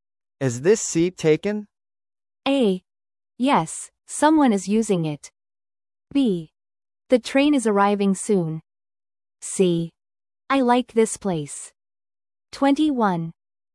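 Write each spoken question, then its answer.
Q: Is this seat taken?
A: A: Yes, someone is using it.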